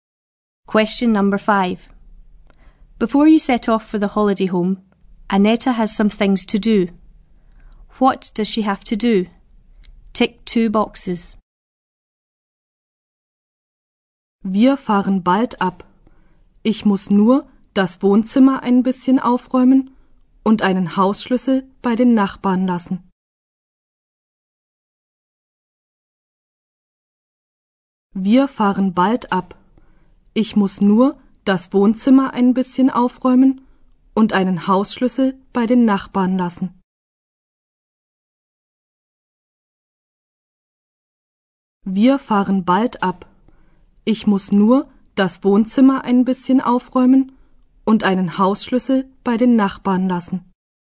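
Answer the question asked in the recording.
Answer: Tidy the living room; leave a house key with the neighbours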